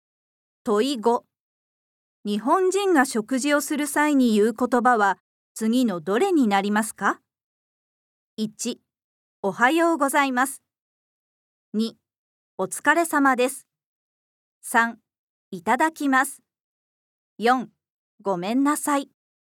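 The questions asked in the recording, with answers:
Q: 日本人が食事をする際に言う言葉は次のどれになりますか。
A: 3: いただきます。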